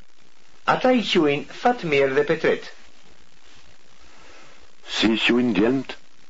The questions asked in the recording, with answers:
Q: Si i quin djelmt?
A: Djelmt i quin Fatmir dhe Petret.